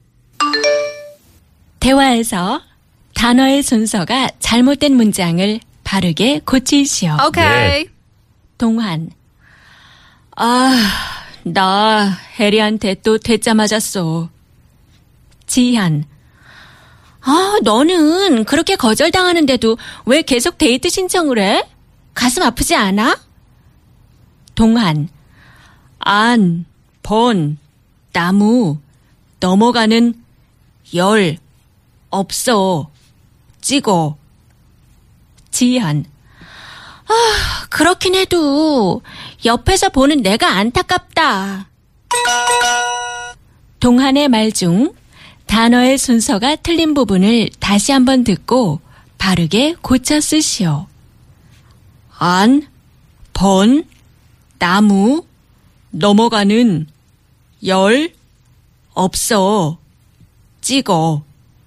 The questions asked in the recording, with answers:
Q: 동한의 말 중 단어의 순서가 틀린 부분을 다시 한번 듣고 바르게 고쳐 쓰시오.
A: 열 번 찍어 안 넘어가는 나무 없어.